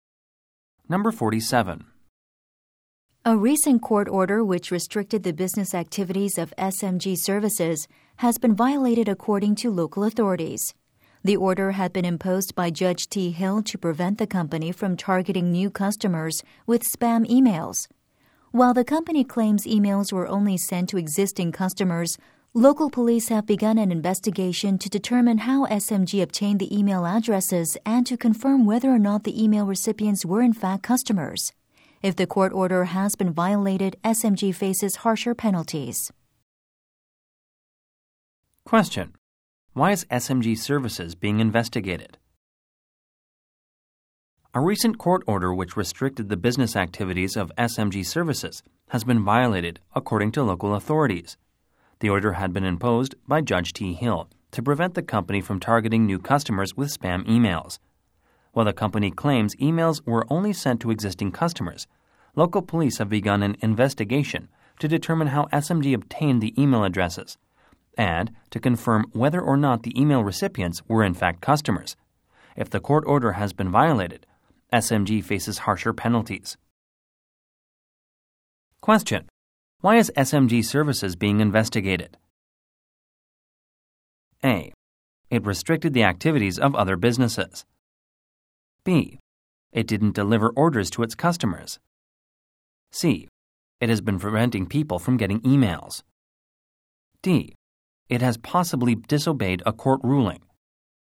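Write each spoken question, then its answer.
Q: Why is SMG Services being investigated?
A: D: It has possibly disobeyed a court ruling.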